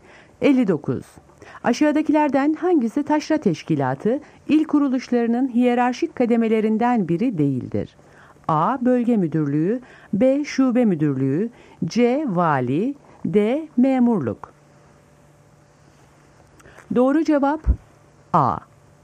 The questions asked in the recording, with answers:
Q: Aşağıdakilerden hangisi taşra teşkilatı il kuruluşlarının hiyerarşik kademelerinden biri değildir?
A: Doğru cevap A.